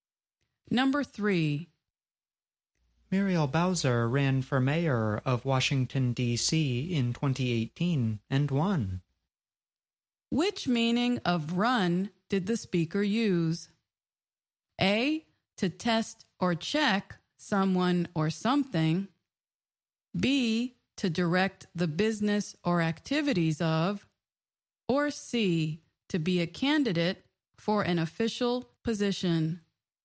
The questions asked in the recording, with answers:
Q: Which meaning of run did the speaker use?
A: The answer is C, to be a candidate for an official position.